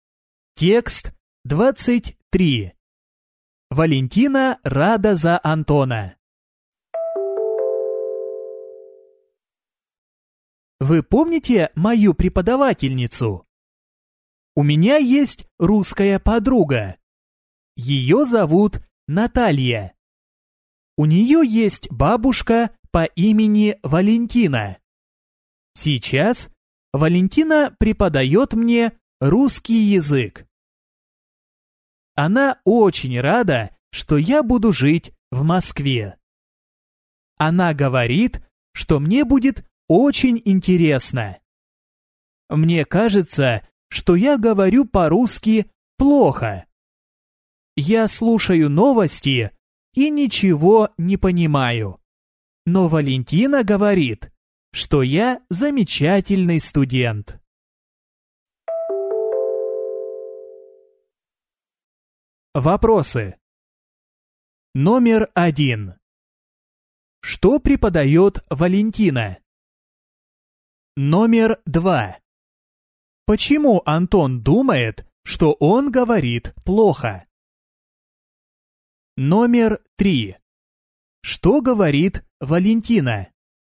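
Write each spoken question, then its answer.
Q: Что преподает Валентина?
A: Русский язык

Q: Почему Антон думает, что он говорит плохо?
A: Он слушает новости и ничего не понимает

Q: Что говорит Валентина?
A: Что Антон замечательный студент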